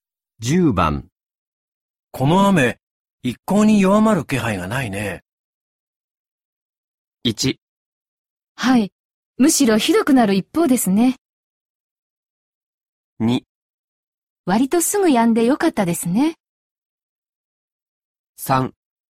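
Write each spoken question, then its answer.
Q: この雨、一向に弱まる気配がないね。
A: 1: はい、むしろひどくなる一方ですね。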